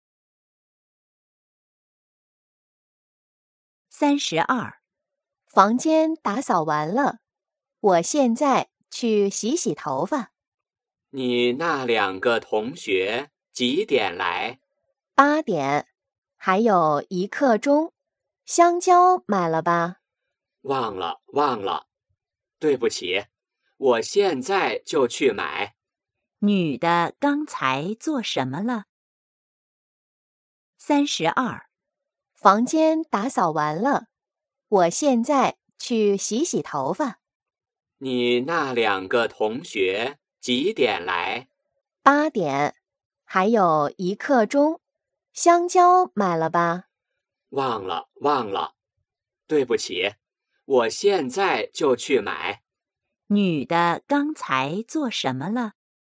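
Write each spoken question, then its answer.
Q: 女的刚才做什么了?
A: 打扫房间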